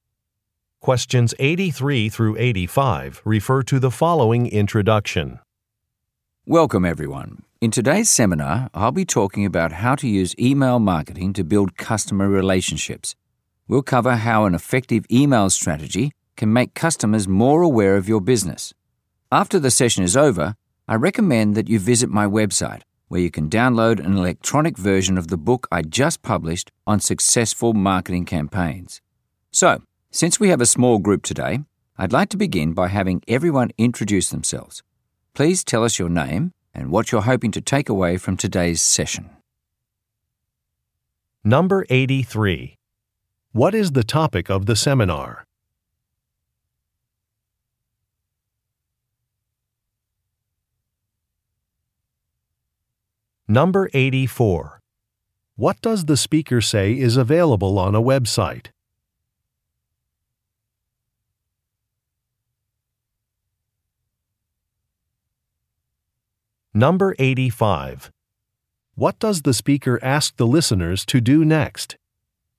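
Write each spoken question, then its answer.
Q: What is the topic of the seminar?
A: Email marketing

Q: What does the speaker say is available on a website?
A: An electronic version of her book

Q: What does the speaker ask the listeners to do next?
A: Introduce themselves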